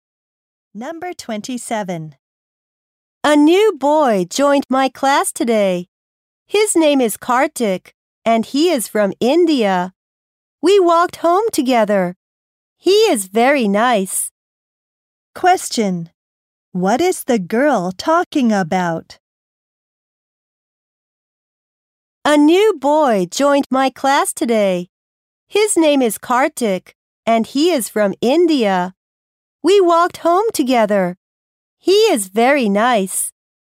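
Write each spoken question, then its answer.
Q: What is the girl talking about?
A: A new boy in her class.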